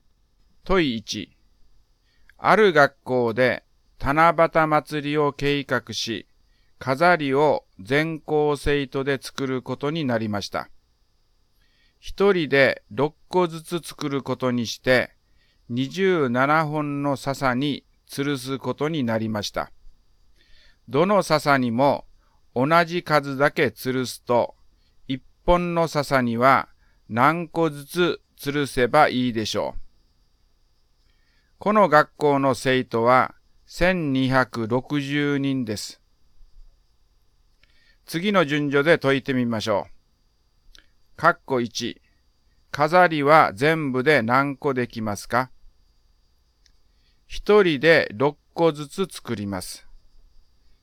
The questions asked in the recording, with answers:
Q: 括弧1、飾りは全部で何個できますか?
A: 6×1260 は7560で、